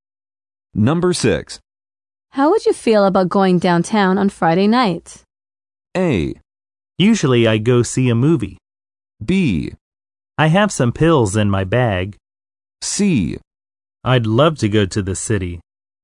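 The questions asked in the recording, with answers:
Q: How would you feel about going downtown on Friday night?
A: C: I'd love to go to the city.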